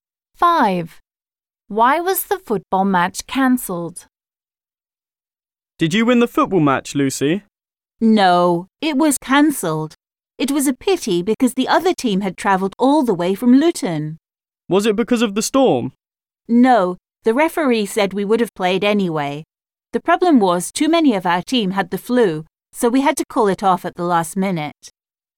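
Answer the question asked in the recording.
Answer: Too many players in the team had the flu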